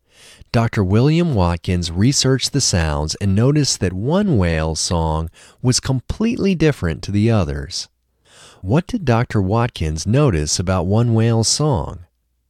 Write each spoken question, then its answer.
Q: What did Dr. Watkins notice about one whale's song?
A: Dr. Watkins noticed that one whale's song was completely different to the others.